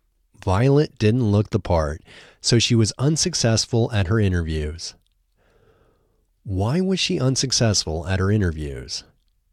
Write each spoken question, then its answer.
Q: Why was she unsuccessful at her interviews?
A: She was unsuccessful at her interviews because she didn't look the part.